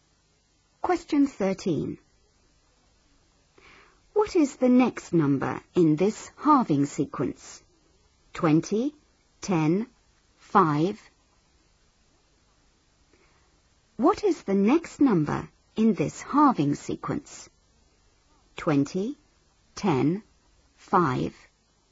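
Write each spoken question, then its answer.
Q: What is the next number in this halving sequence?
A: 2.5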